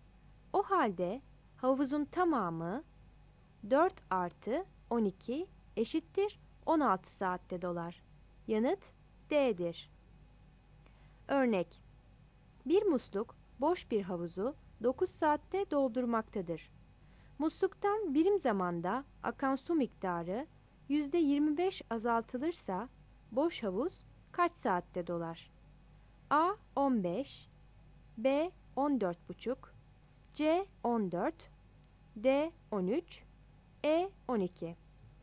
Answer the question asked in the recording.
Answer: Yanıt E'dir.